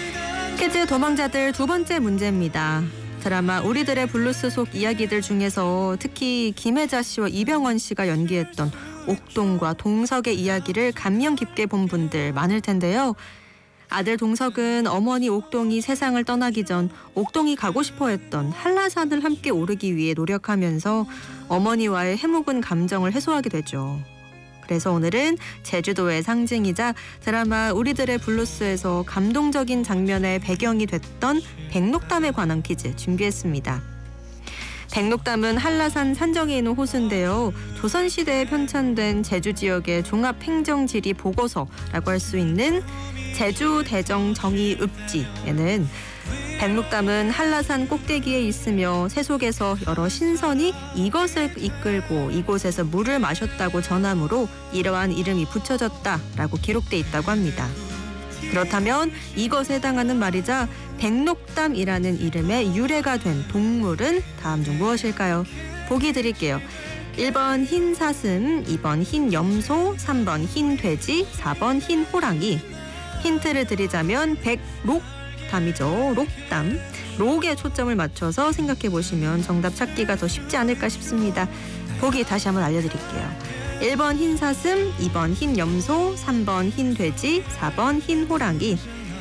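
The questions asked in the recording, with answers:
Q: 그렇다면 이것에 해당하는 말이자 백록담이라는 이름의 유래가 된 동물은 다음 중 무엇일까요?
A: 1: 흰 사슴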